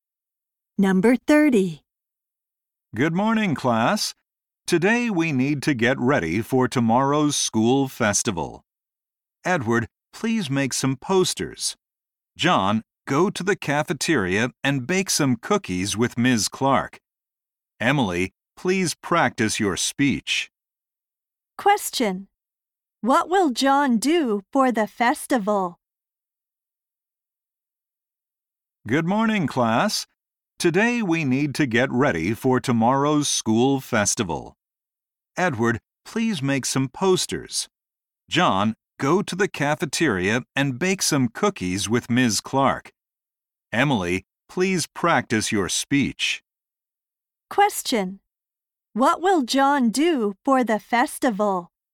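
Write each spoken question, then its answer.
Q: What will John do for the festival?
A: Bake cookies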